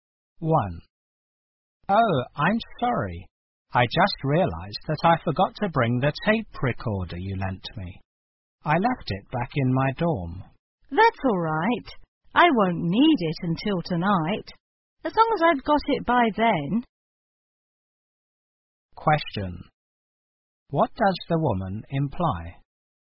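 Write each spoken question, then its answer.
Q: What does the woman imply?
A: The man can return the tape recorder later, as long as she has it by tonight.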